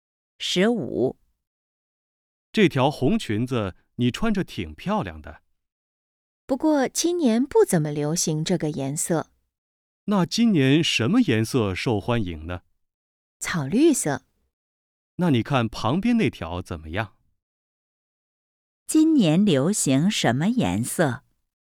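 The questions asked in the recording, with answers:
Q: 今年流行什么颜色?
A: 草绿色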